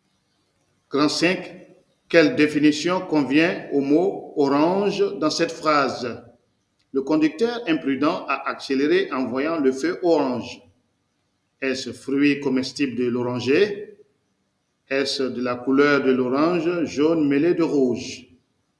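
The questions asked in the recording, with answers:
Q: Quelle définition convient au mot orange dans cette phrase?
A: De la couleur de l'orange, jaune mêlée de rouge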